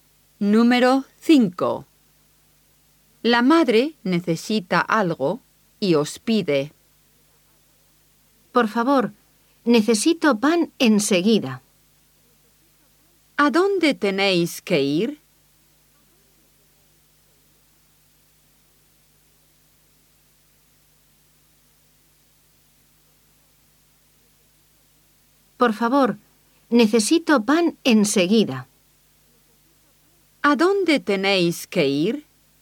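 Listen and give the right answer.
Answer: A la panadería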